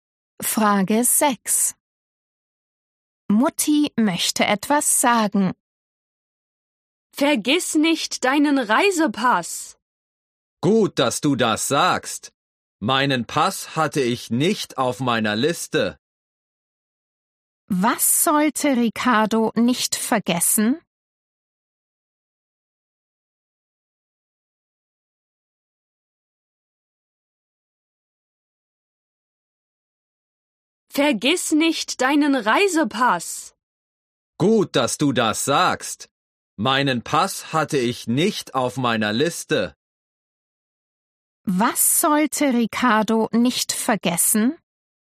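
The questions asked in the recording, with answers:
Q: Was sollte Ricardo nicht vergessen?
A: seinen Reisepass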